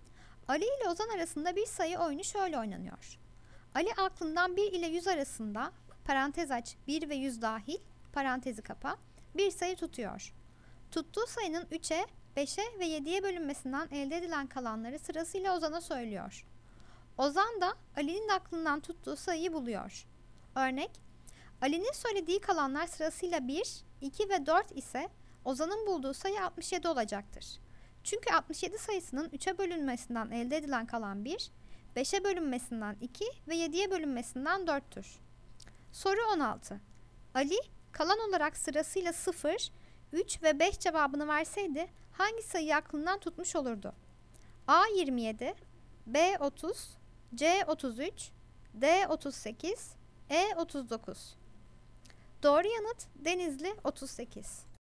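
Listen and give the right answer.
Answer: C: 33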